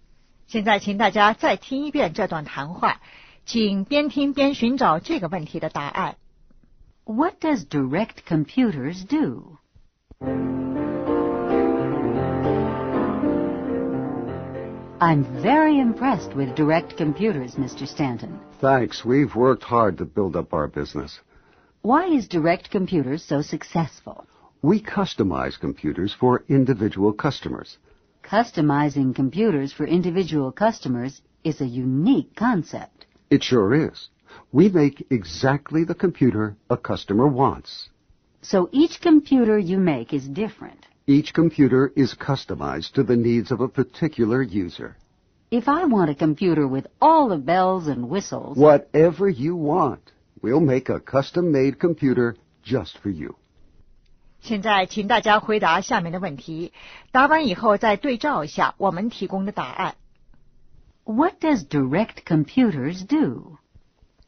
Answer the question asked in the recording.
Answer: They customize computers for individual customers.